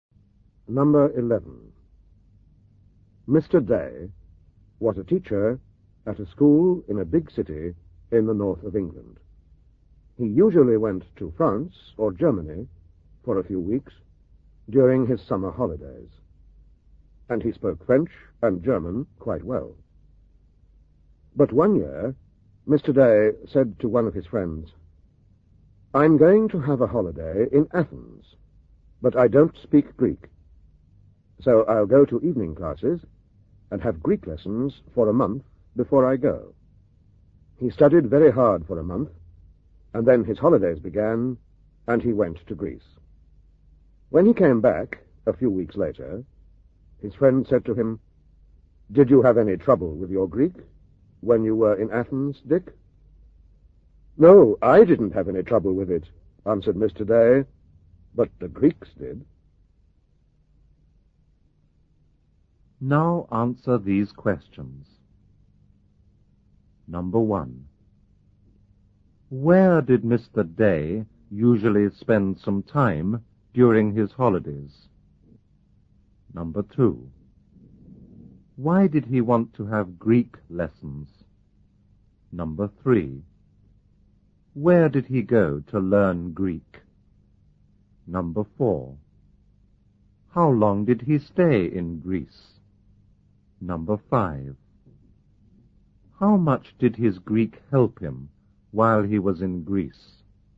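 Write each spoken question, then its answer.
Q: Where did Mr. Day usually spend some time during his holidays?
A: In France or Germany

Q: Why did he want to have Greek lessons?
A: Because he was going to Athens and didn't speak Greek

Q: Where did he go to learn Greek?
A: To evening classes

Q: How long did he stay in Greece?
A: A few weeks

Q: How much did his Greek help him while he was in Greece?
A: Not much; the Greeks couldn't understand it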